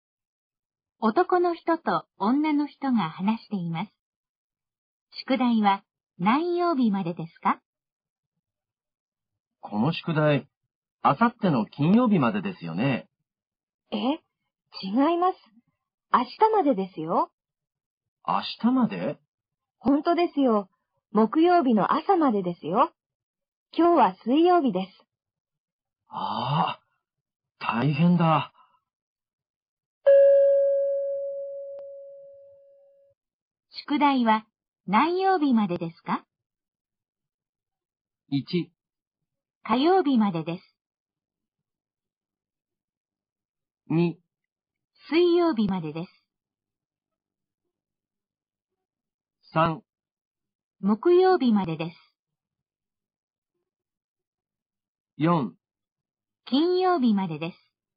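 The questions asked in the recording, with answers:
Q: 宿題は何曜日までですか?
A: 3: 木曜日までです。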